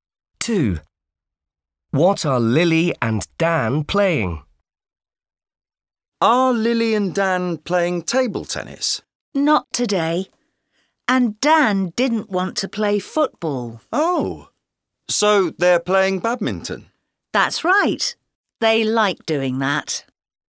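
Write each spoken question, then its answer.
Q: What are Lily and Dan playing?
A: badminton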